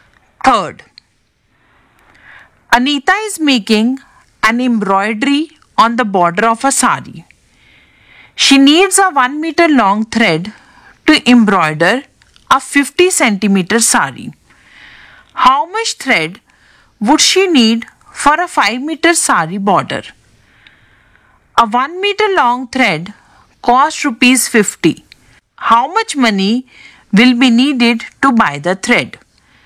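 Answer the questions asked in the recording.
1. 10 meters
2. Rupees 500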